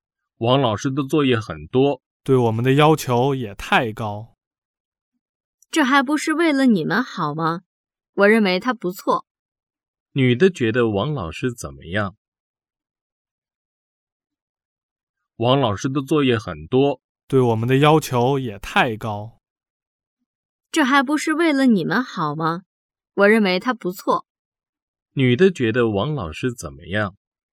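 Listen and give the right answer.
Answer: 不错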